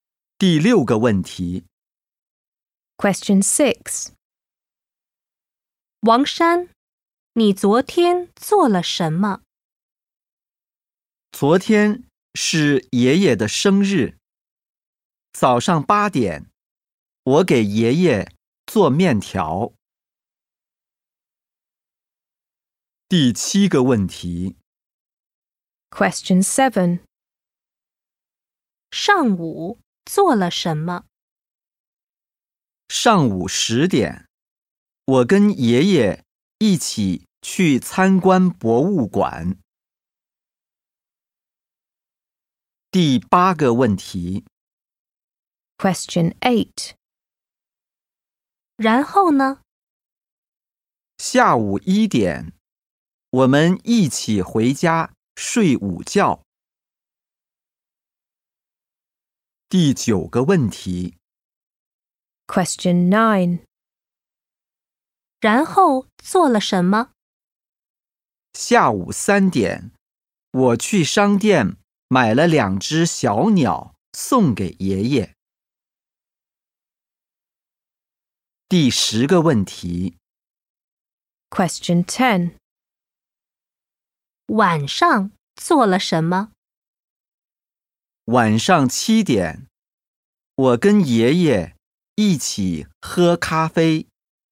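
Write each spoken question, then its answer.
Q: 王山,你昨天做了什么?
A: 早上给爷爷做面条

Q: 上午做了什么?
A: 跟爷爷一起去参观博物馆

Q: 然后做了什么?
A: 去商店买了两只小鸟

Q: 晚上做了什么?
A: 跟爷爷一起喝咖啡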